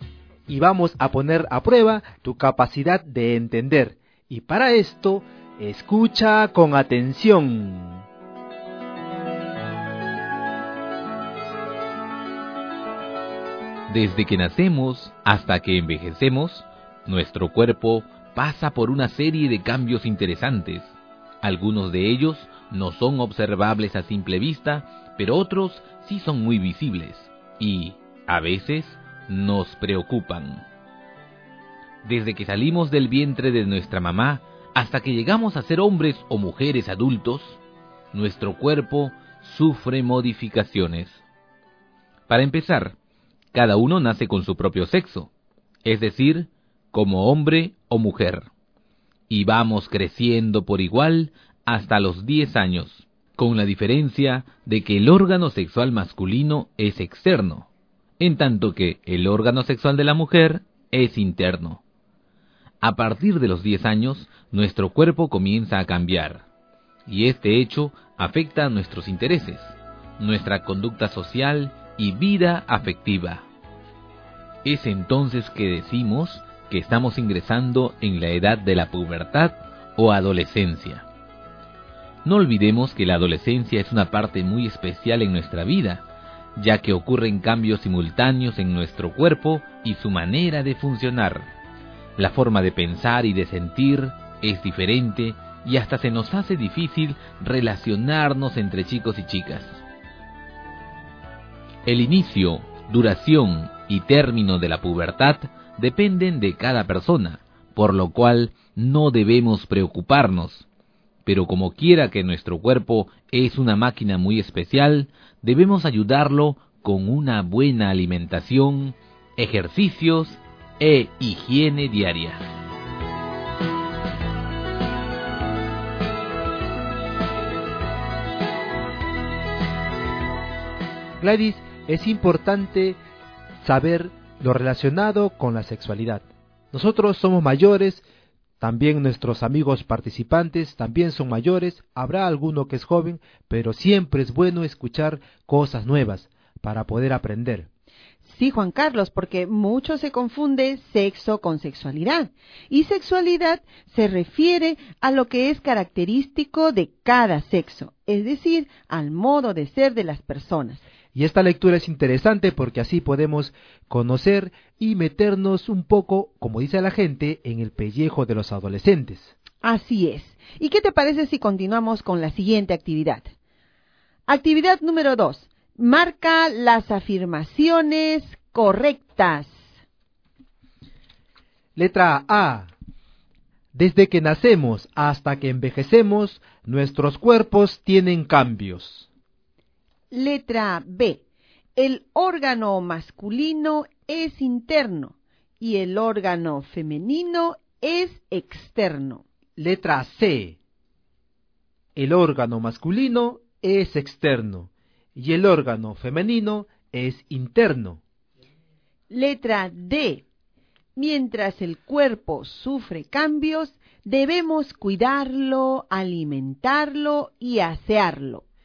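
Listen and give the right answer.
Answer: A, C y D: cambios desde que nacemos; órgano masculino externo y femenino interno; cuidarlo, alimentarlo y asearlo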